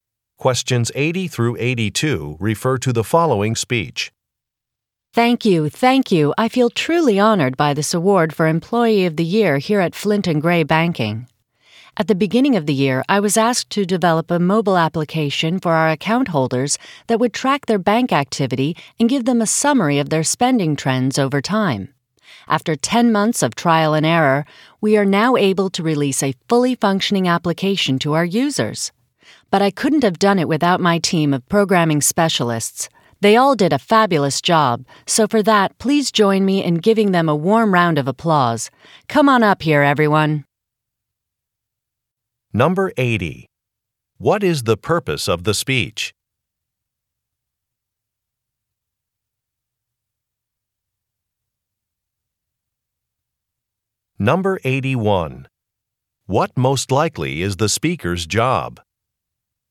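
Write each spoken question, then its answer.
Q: What is the purpose of the speech?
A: To accept an award

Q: What most likely is the speaker's job?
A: Software developer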